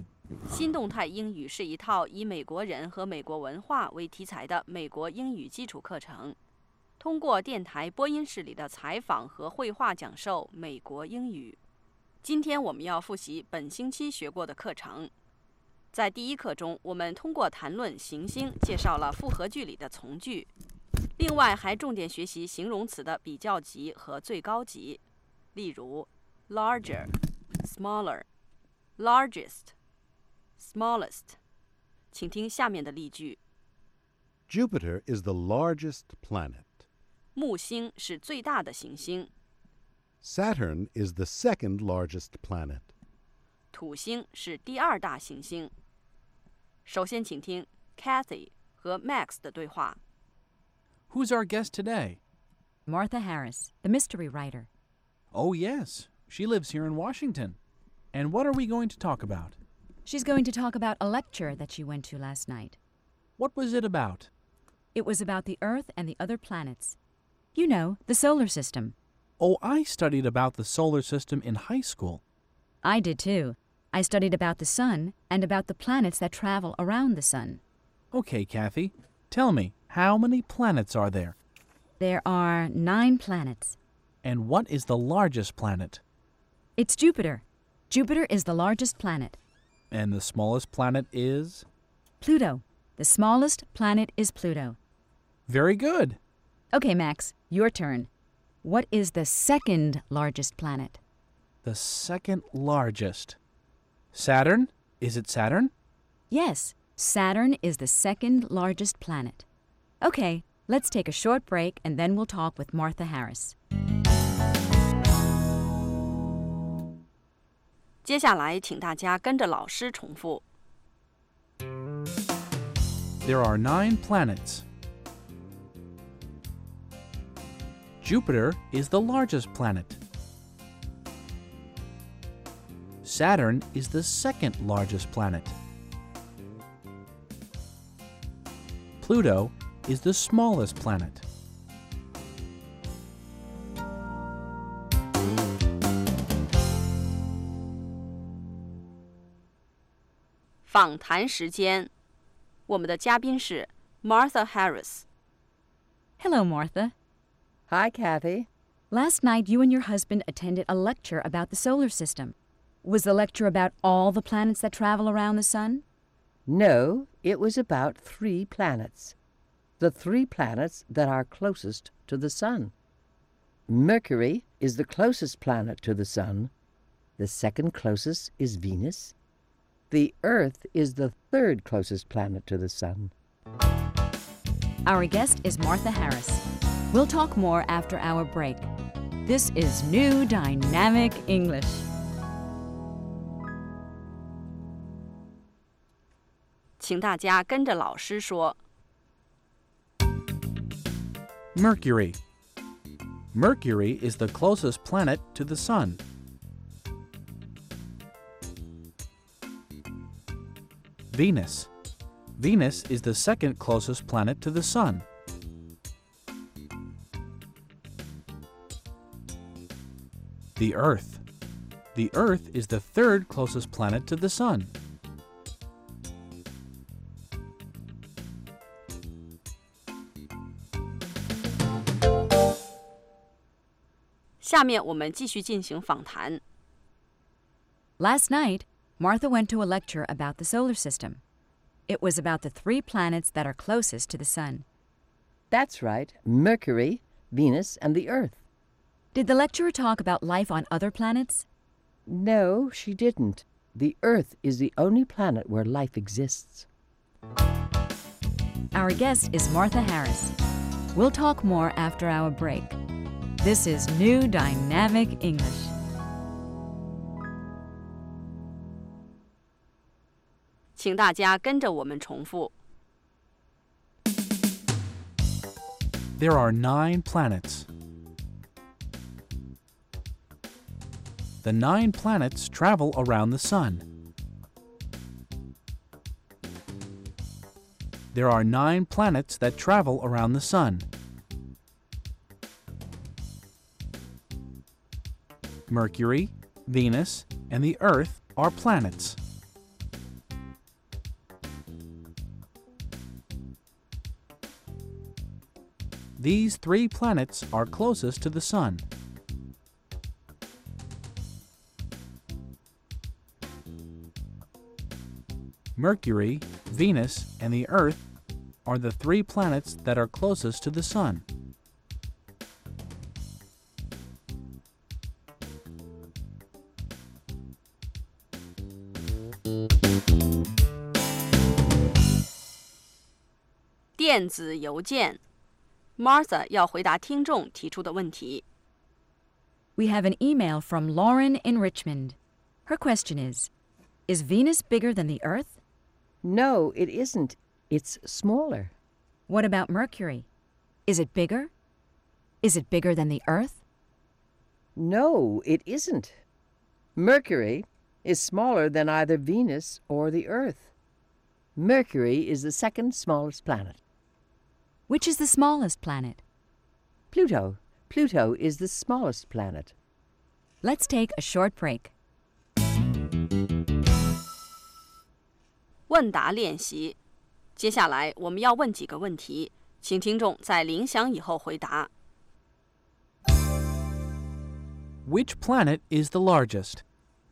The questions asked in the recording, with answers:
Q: Which planet is the largest?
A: Jupiter is the largest planet.